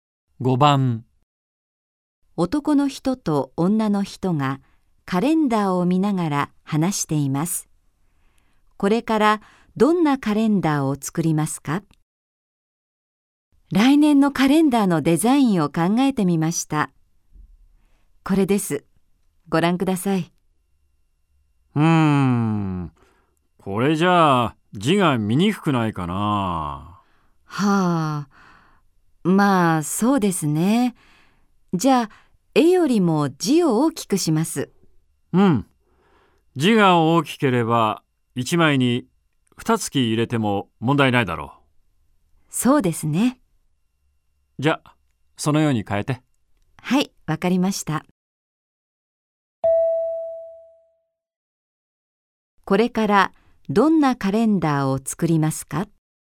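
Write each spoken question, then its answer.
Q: これからどんなカレンダーを作りますか?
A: 絵より字が大きく、1枚に2か月入ったカレンダー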